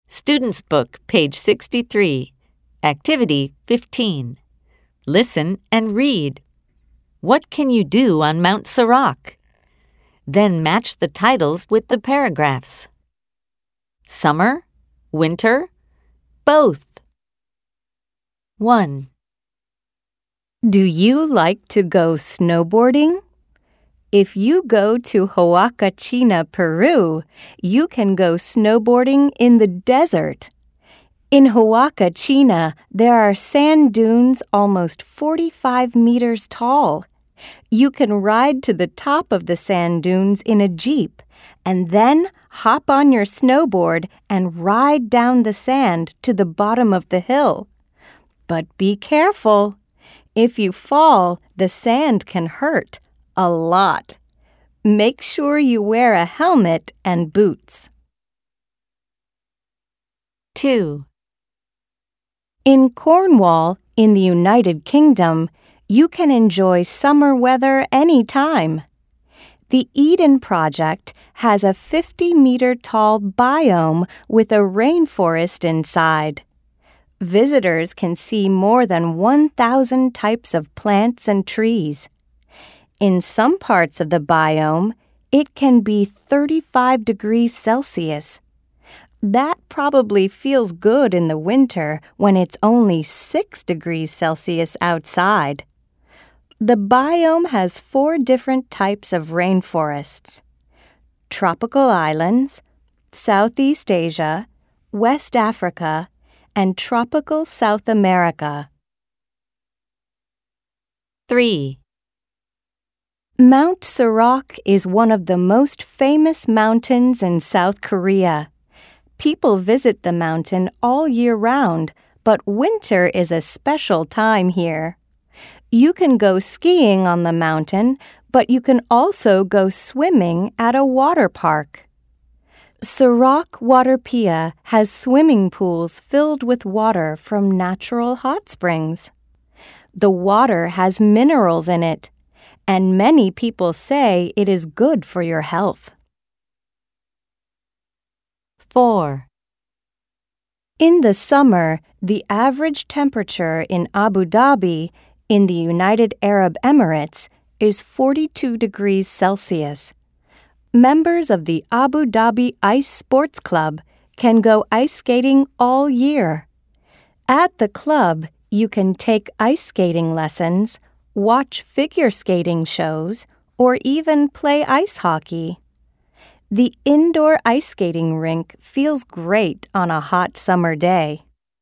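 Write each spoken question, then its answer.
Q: What can you do on Mount Sirac?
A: You can go skiing and swimming at a water park with hot spring water.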